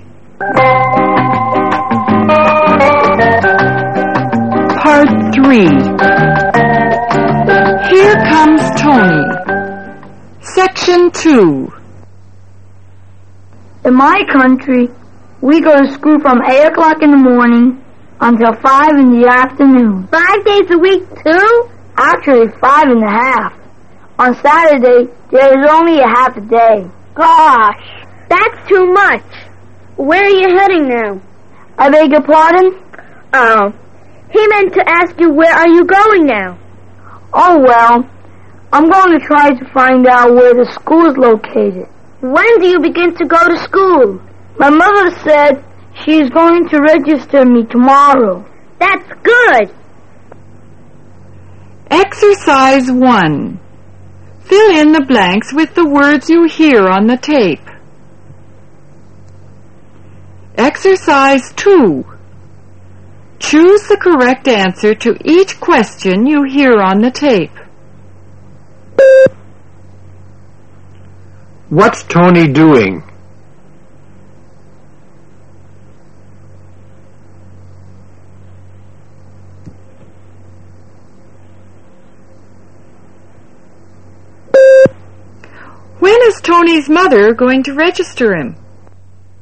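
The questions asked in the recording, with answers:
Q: When is Tony's mother going to register him?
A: Tomorrow.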